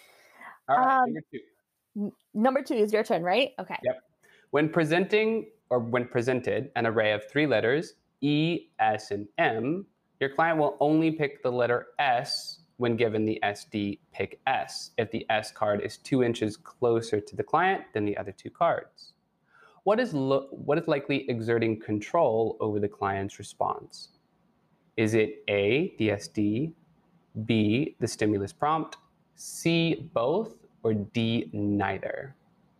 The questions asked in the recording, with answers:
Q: What is likely exerting control over the client's response?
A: Okay, so I'm gonna say B, the stimulus prompt